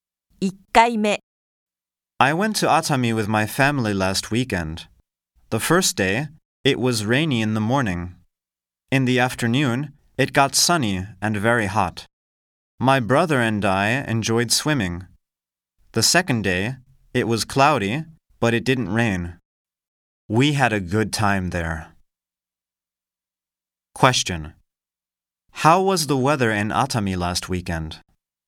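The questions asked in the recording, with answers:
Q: How was the weather in Atami last weekend?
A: Rainy, then sunny on the first day; cloudy on the second day.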